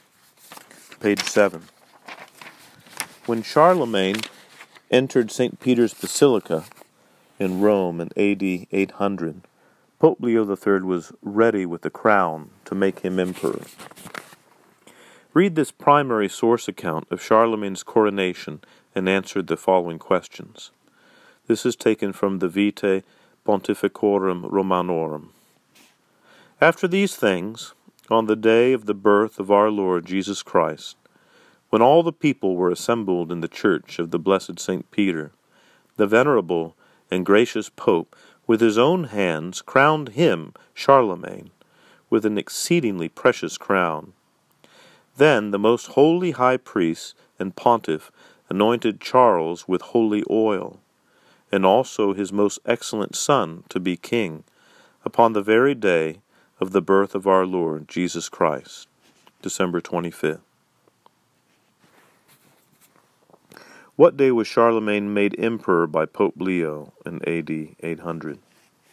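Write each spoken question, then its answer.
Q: What day was Charlemagne made emperor by Pope Leo in AD 800?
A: December 25th, Christmas Day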